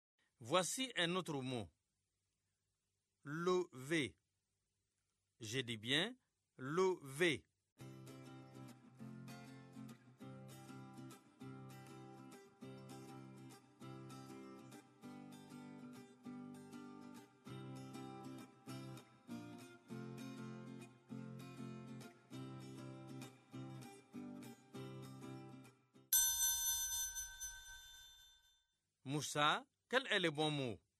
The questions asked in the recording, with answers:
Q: Moussa, quel est le bon mot?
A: Vélo.